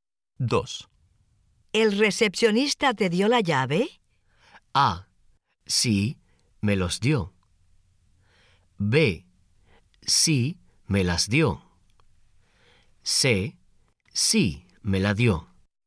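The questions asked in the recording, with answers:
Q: ¿El recepcionista te dio la llave?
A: C: Sí, me la dio.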